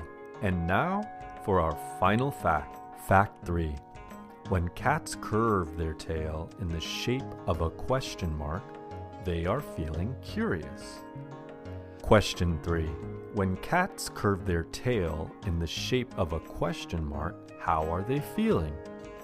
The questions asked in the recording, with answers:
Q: When cats curve their tail in the shape of a question mark, how are they feeling?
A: When cats curve their tail in the shape of a question mark, they are feeling curious.